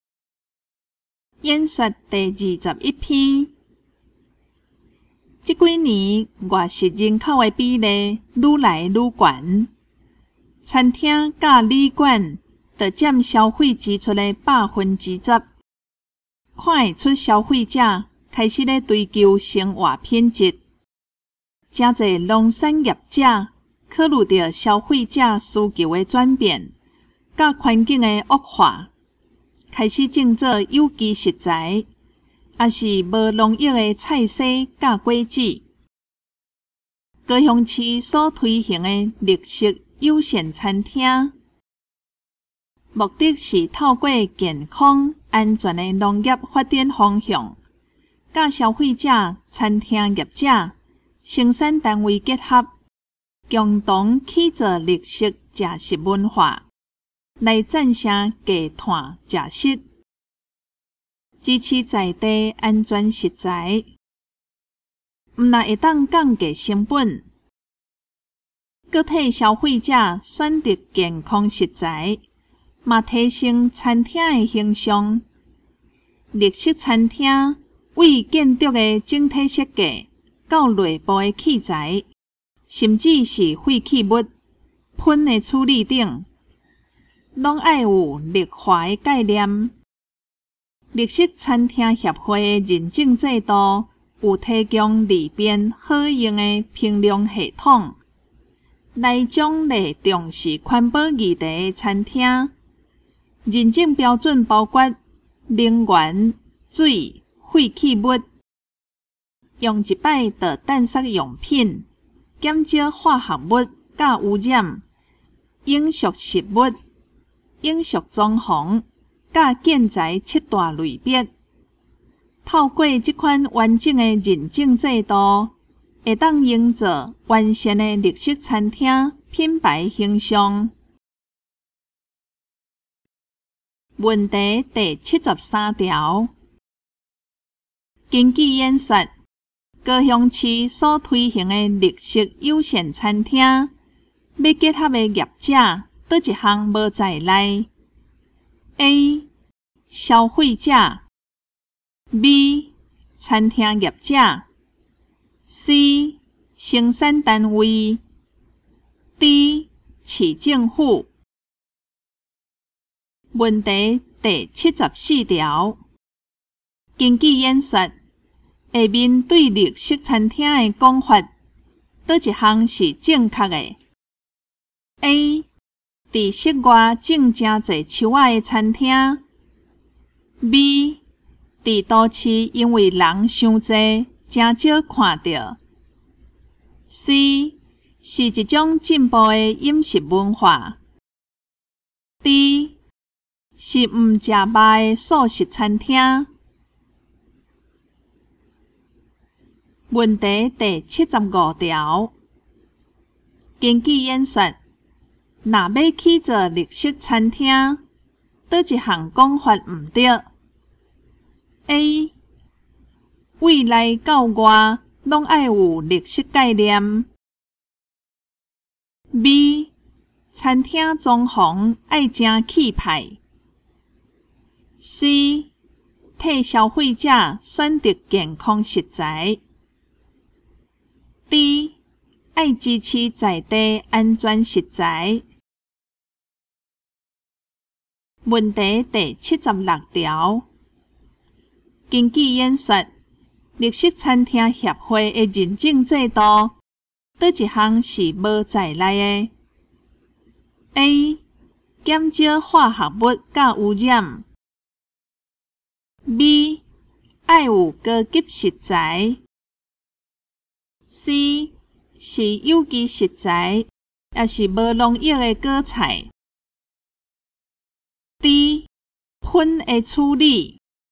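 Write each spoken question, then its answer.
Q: 根据演说,高雄市所推行的绿色友善餐厅,要结合的业者哪一项无在内 ?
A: D: 市政府

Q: 根据演说,若要起做绿色餐厅,哪一项讲法唔对 ?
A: B: 餐厅装潢爱真气派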